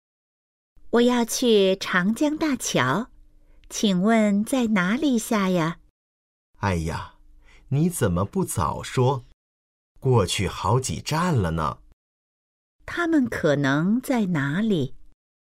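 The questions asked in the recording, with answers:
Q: 他们可能在哪里?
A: 公共汽车上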